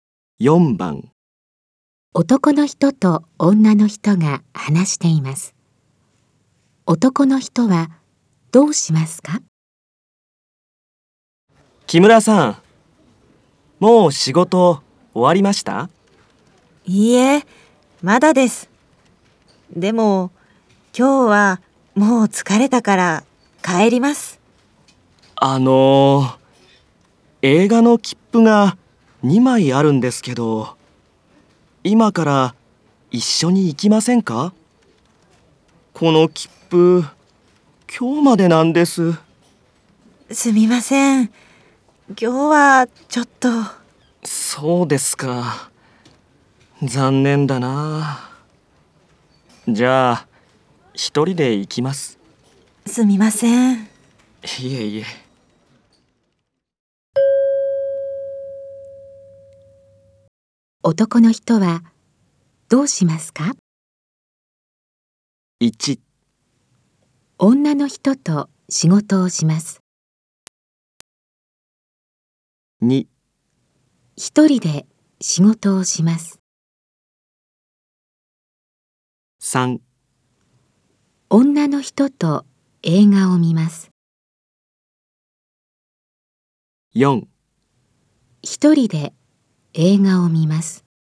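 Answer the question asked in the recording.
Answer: 4: 一人で映画を見ます。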